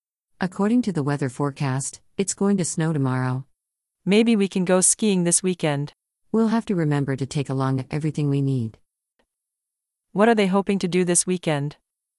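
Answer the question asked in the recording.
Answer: Go skiing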